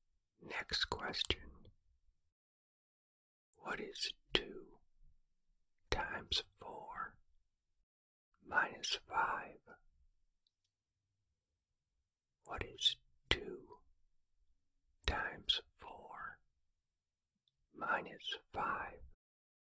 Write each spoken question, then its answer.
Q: What is 2 times 4 minus 5?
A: The answer is 3.